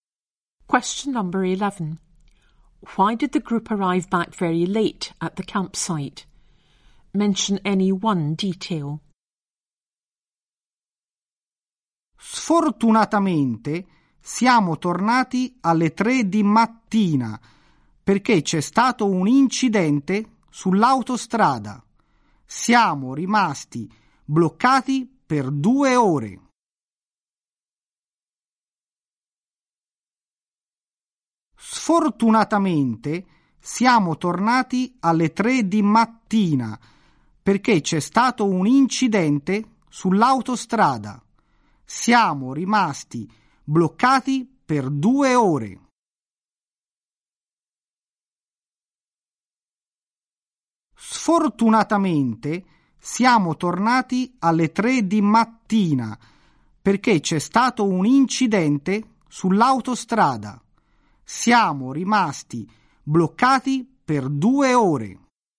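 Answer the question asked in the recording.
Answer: There was an accident on the motorway; they were stuck for 2 hours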